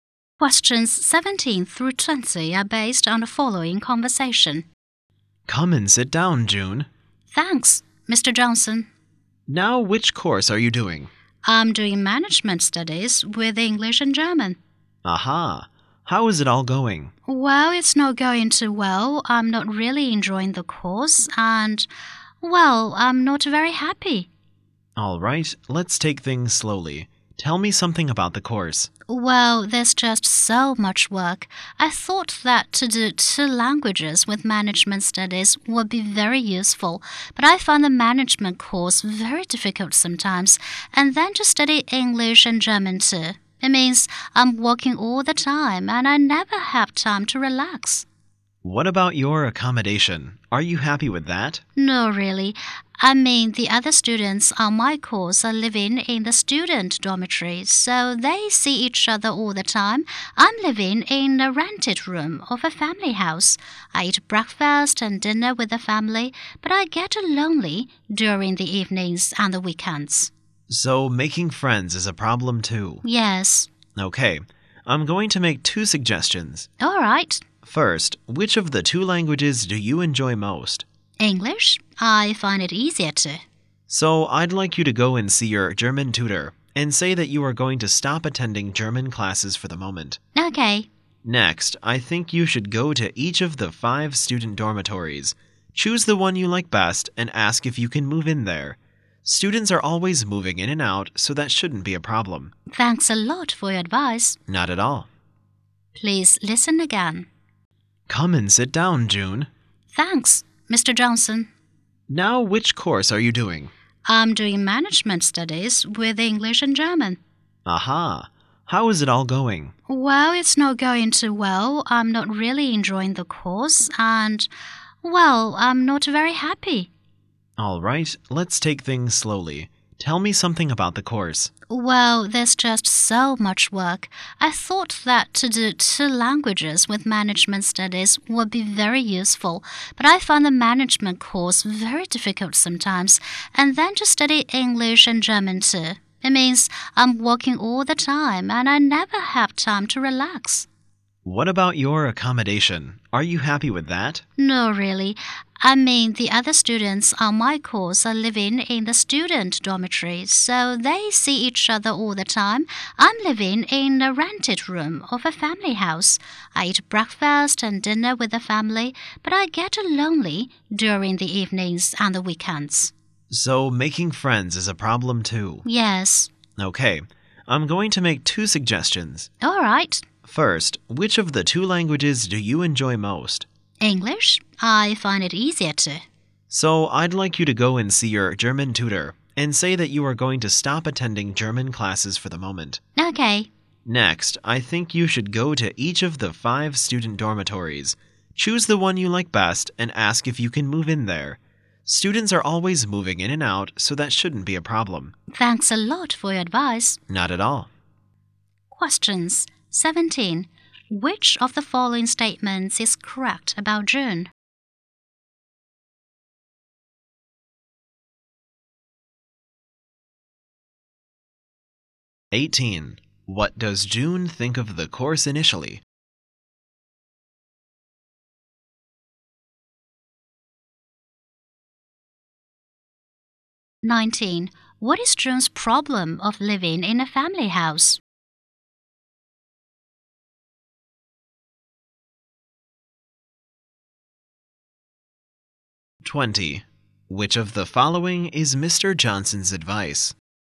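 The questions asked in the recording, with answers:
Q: What does June think of the course initially?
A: Very useful

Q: What is June's problem of living in a family house?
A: She gets lonely in the evenings and at weekends

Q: Which of the following is Mr. Johnson's advice?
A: Stop German classes for now and move into a student dormitory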